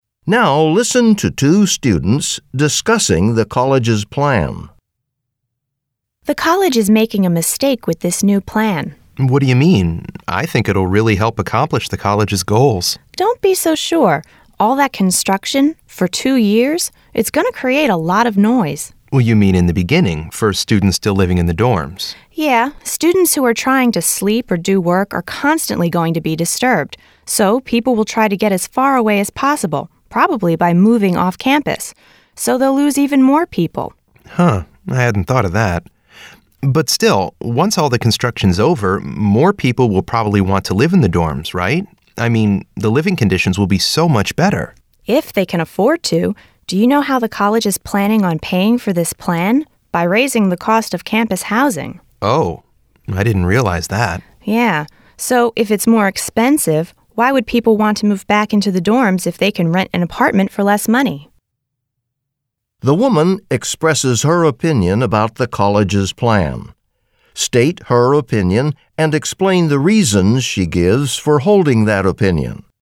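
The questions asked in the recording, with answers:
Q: The woman expresses her opinion about the college's plan. State her opinion and explain the reasons she gives for holding that opinion.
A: She thinks the plan is a mistake: two years of construction noise will disturb students and push them off campus, and the plan is paid for by raising housing costs, so students won't come back when cheaper apartments are available.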